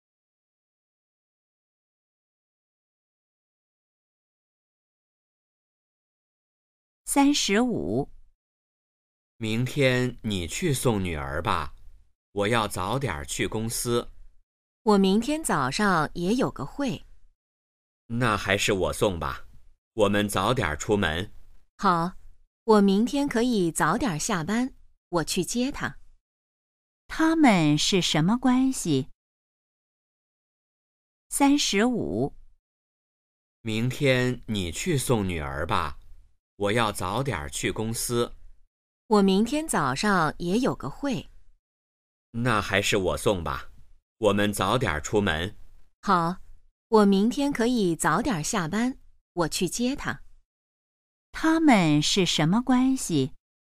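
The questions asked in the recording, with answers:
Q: 他们是什么关系?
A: 夫妻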